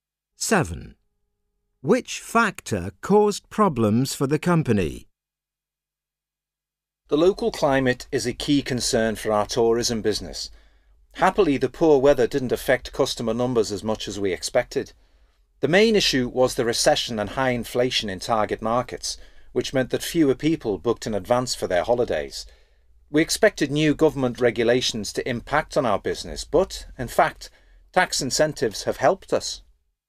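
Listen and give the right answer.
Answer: The recession and high inflation in target markets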